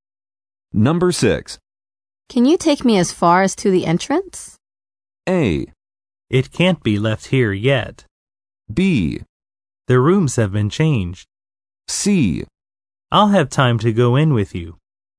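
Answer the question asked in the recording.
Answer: C: I'll have time to go in with you.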